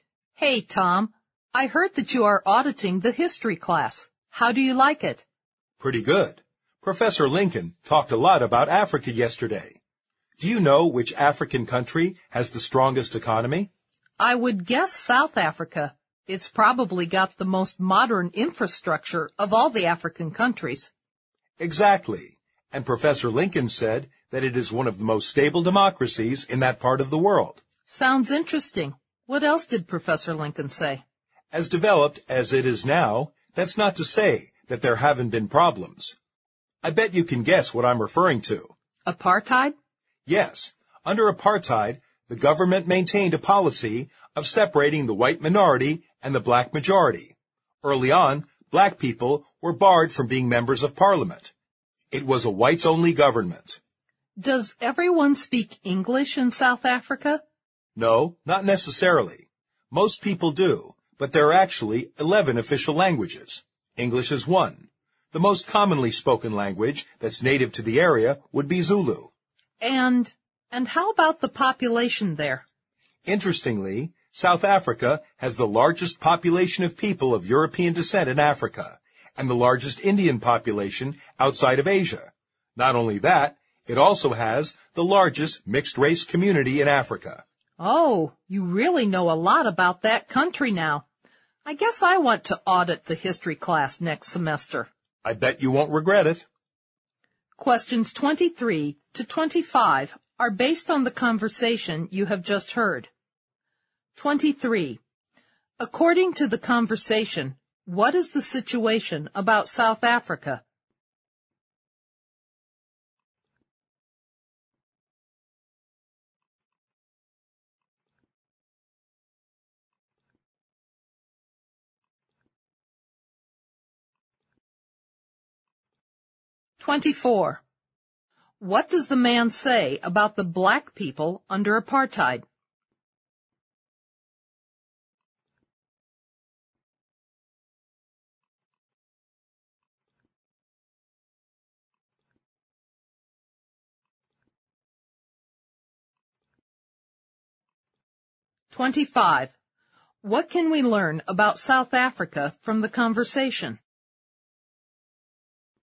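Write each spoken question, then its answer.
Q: What does the man say about the black people under apartheid?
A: They were kept separate from whites and barred from being members of parliament.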